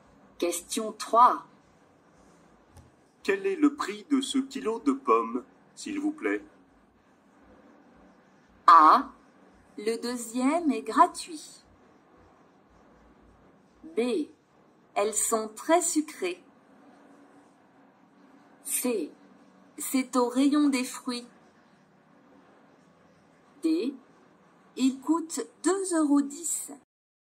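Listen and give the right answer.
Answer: D: Il coûte 2,10 €.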